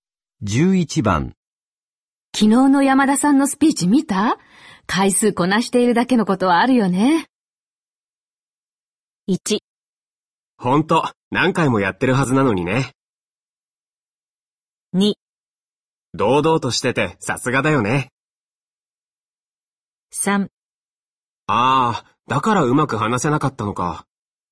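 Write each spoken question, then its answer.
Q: 昨日の山田さんのスピーチ見た回数こなしているだけのことはあるよね。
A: 2: 堂々としててさすがだよね。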